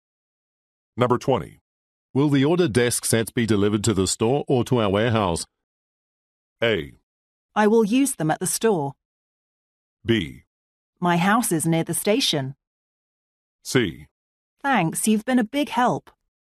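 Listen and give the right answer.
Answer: A: I will use them at the store.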